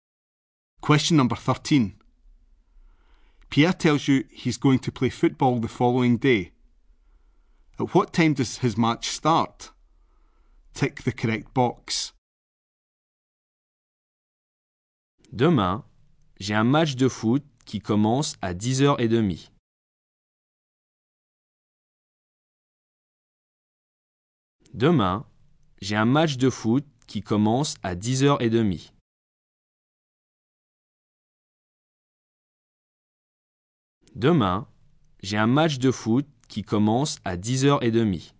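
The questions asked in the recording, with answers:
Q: At what time does his match start?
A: 10:30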